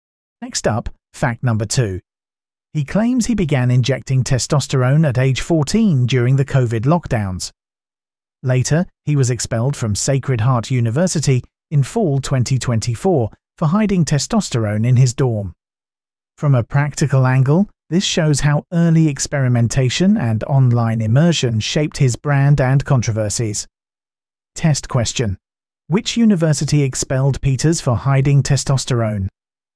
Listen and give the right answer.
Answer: Correct answer. Sacred Heart University.